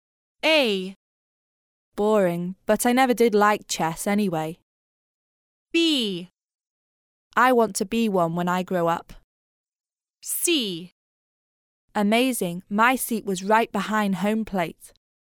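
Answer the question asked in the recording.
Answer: C: Amazing, my seat was right behind home plate.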